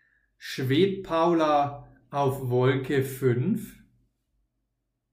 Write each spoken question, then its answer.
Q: Schwebt Paula auf Wolke 5?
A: Nein, sie schwebt nicht auf Wolke 5.